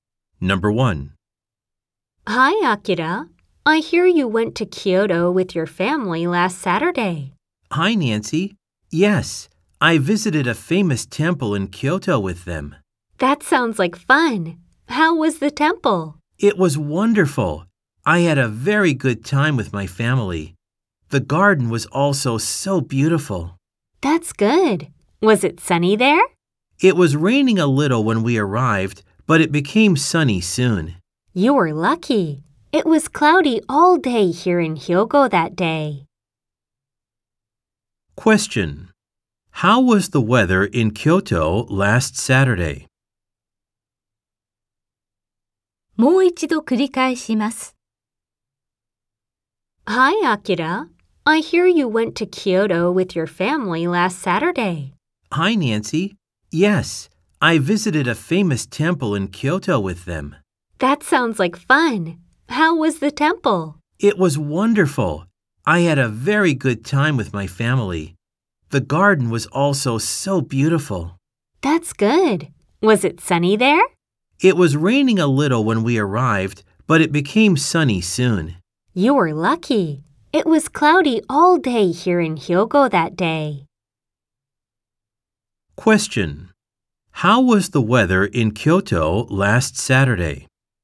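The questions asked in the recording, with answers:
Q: How was the weather in Kyoto last Saturday?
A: Rainy a little at first, then sunny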